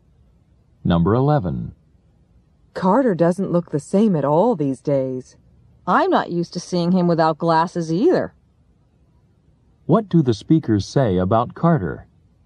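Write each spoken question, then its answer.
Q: What do the speakers say about Carter?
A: He no longer wears glasses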